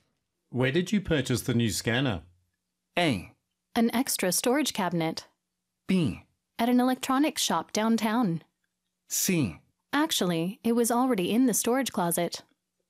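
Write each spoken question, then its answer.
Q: Where did you purchase the new scanner?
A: B: At an electronics shop downtown.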